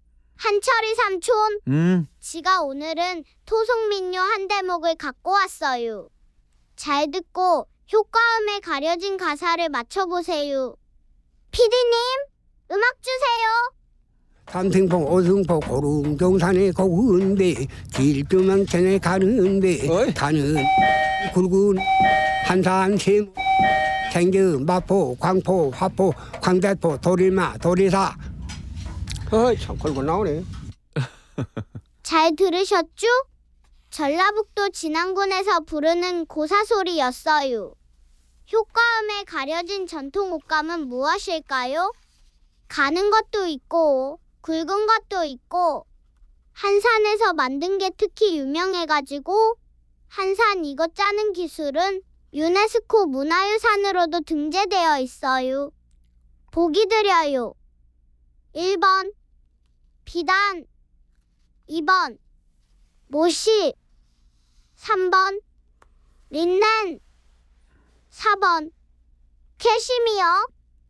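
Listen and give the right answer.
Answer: 2번: 모시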